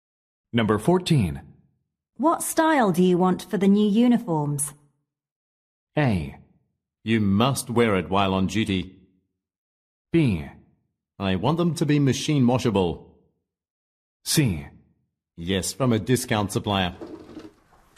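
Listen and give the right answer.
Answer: B: I want them to be machine washable.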